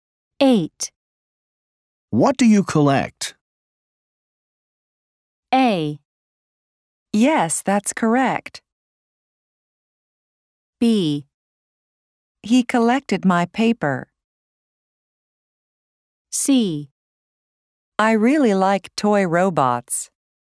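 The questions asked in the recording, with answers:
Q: What do you collect?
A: C: I really like toy robots.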